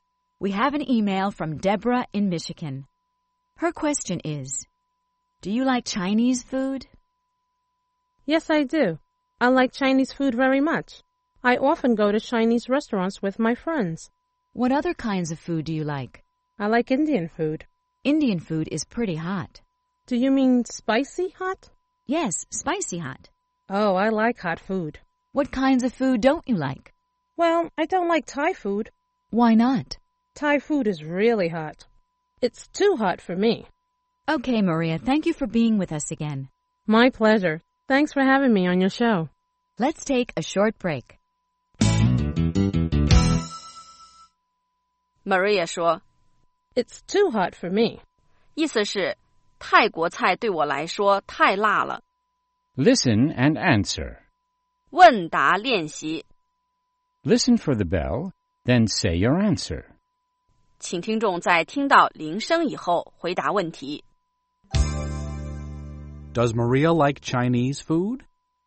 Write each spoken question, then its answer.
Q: Does Maria like Chinese food?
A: Yes, she does. She likes Chinese food.